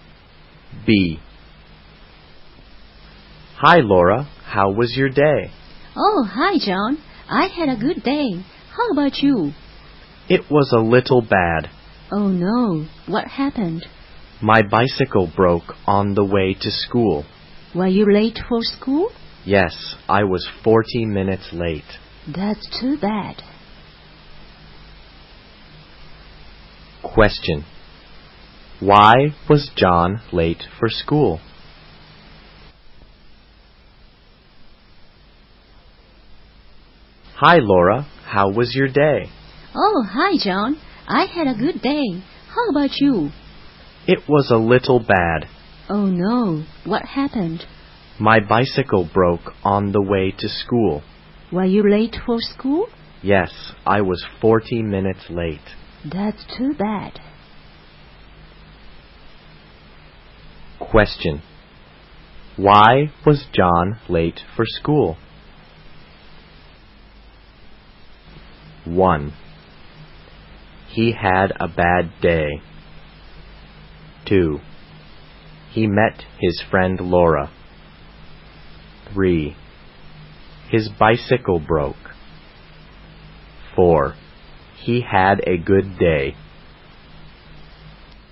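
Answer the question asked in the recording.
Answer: 3: His bicycle broke.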